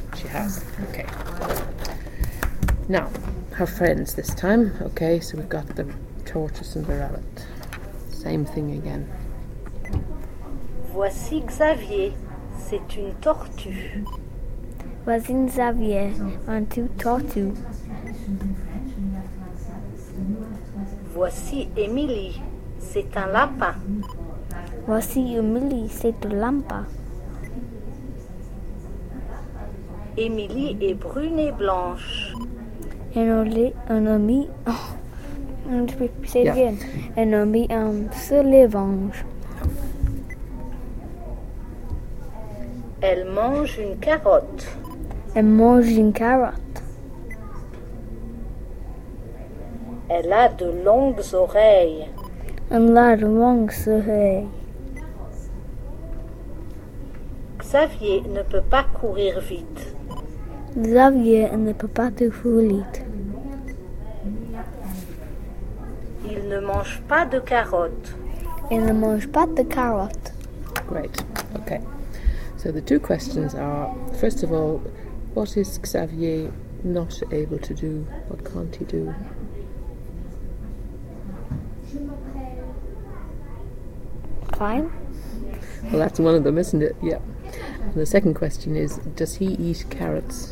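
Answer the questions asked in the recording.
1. Run fast
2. No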